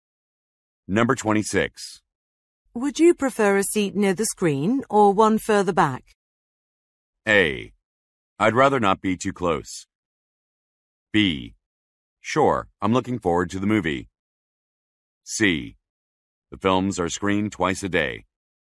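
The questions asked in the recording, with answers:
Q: Would you prefer a seat near the screen or one further back?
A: A: I'd rather not be too close.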